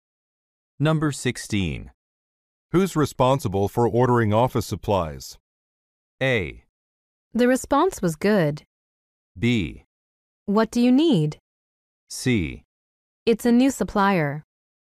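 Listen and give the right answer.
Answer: B: What do you need?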